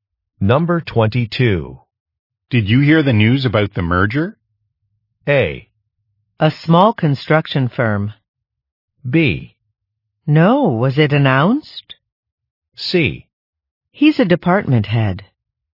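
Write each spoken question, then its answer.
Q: Did you hear the news about the merger?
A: B: No, was it announced?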